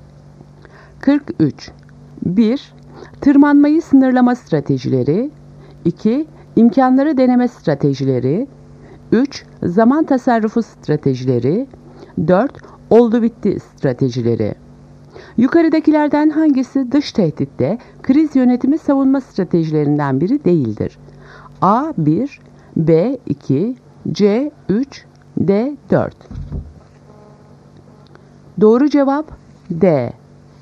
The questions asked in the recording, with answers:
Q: Yukarıdakilerden hangisi dış tehditte kriz yönetimi savunma stratejilerinden biri değildir?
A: Doğru cevap D. 4.